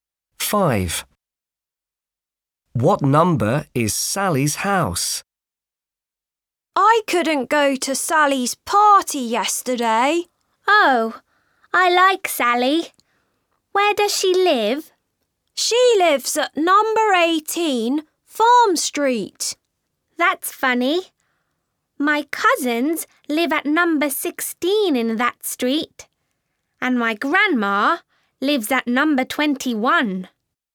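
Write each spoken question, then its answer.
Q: What number is Sally's house?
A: 18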